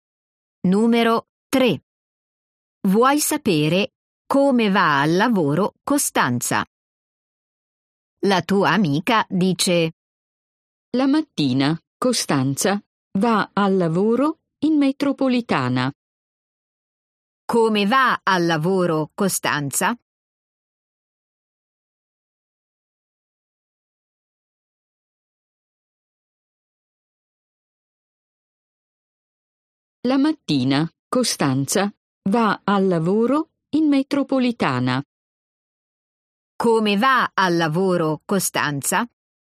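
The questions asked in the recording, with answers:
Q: Come va al lavoro Costanza?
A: In metropolitana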